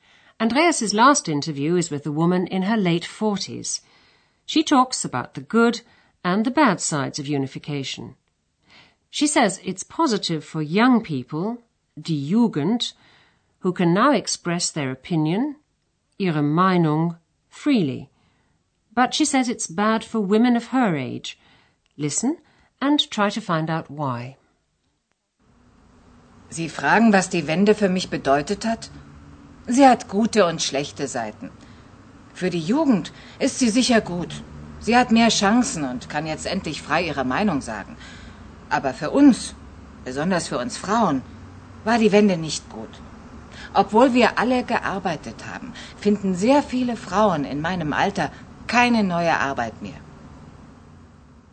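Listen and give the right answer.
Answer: Many women her age can't find new work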